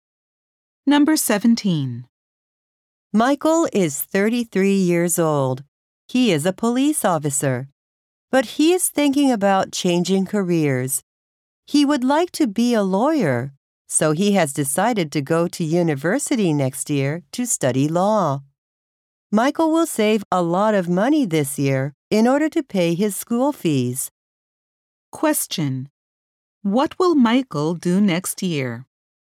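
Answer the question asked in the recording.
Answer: Go to university to study law.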